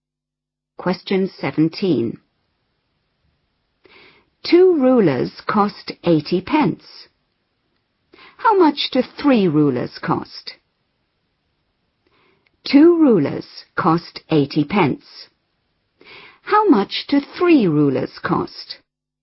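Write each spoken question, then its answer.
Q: How much do 3 rulers cost?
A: £1.20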